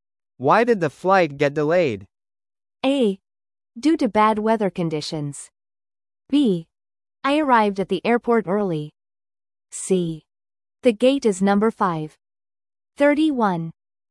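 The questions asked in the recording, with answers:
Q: Why did the flight get delayed?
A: A: Due to bad weather conditions.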